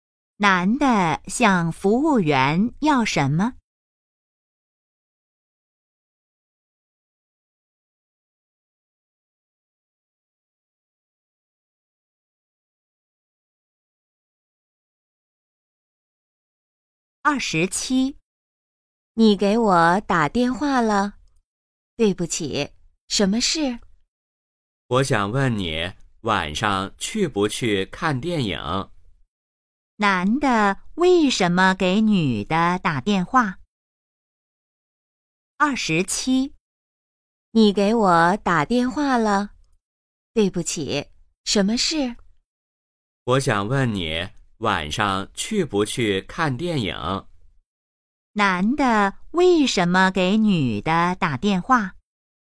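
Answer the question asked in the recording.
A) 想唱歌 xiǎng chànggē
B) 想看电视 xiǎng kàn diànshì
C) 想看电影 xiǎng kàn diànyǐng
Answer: C) 想看电影 xiǎng kàn diànyǐng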